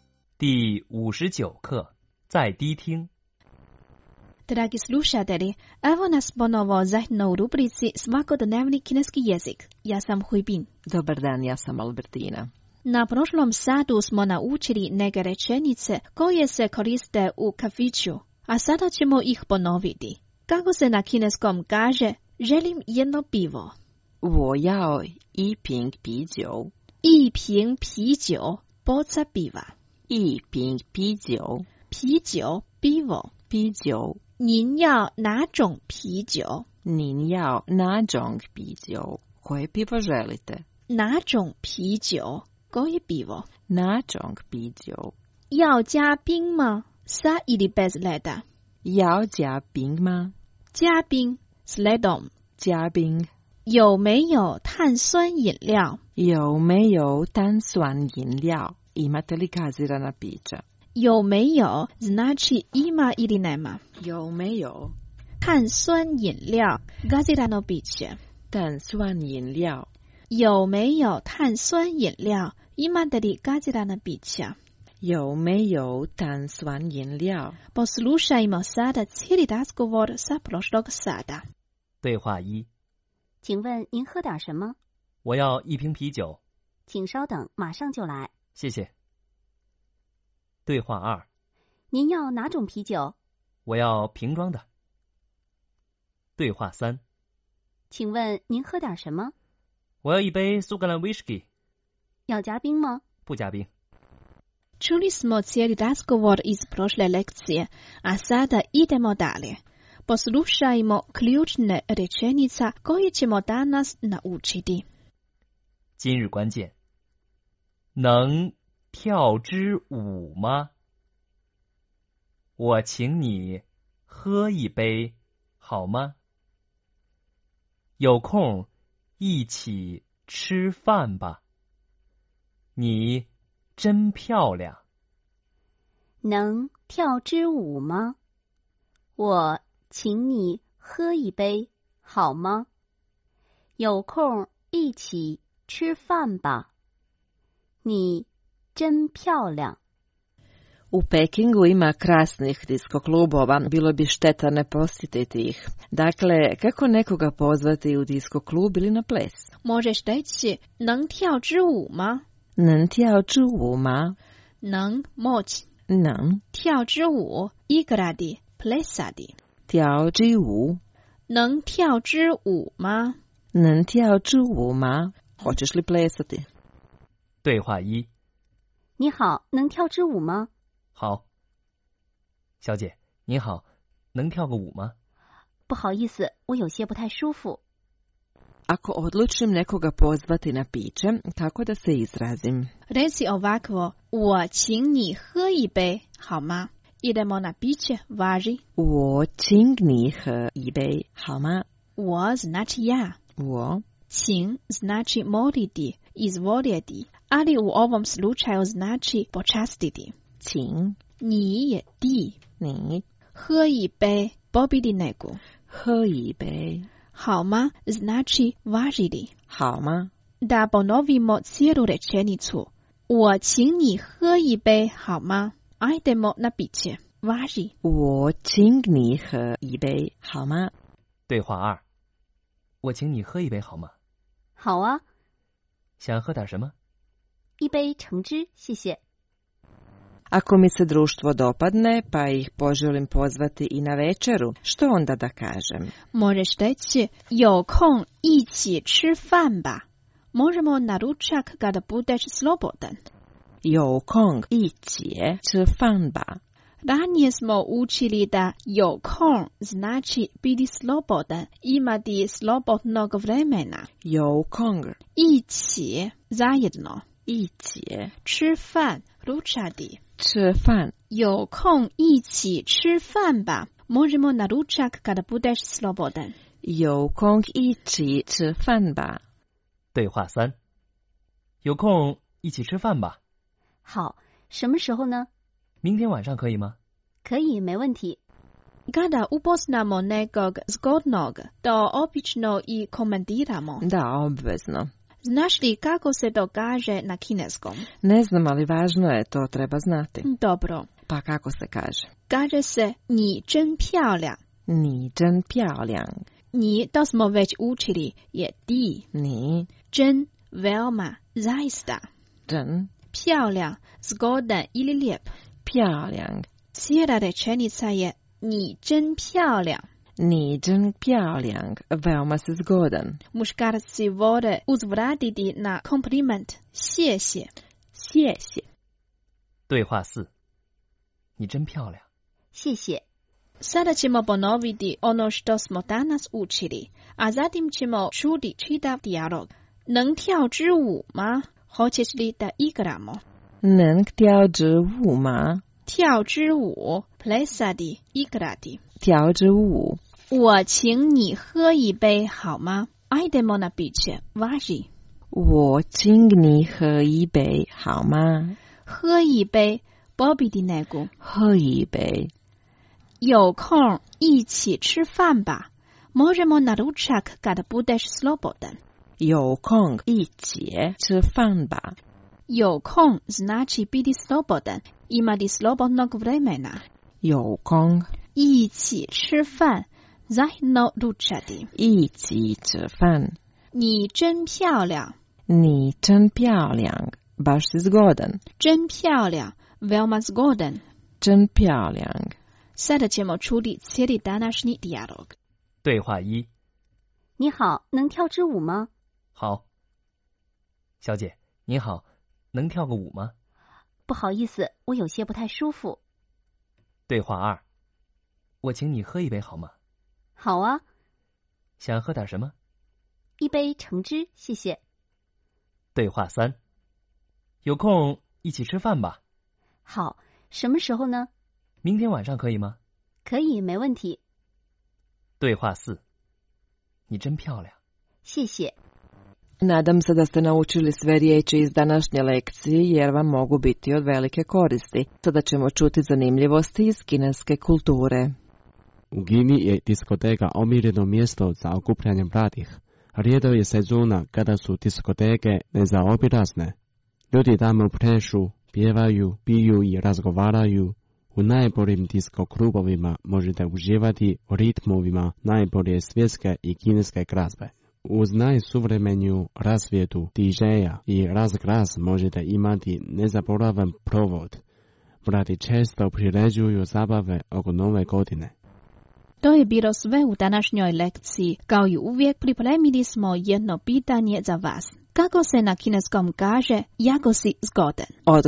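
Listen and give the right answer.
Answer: 你真漂亮 (ni zhen piao liang)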